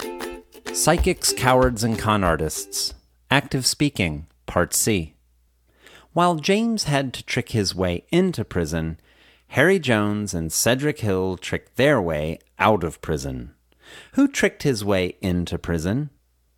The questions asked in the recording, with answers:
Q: Who tricked his way into prison?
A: James tricked his way into prison.